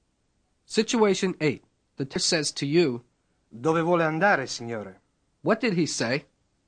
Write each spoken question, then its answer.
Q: What did he say?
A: Where do you wish to go, sir?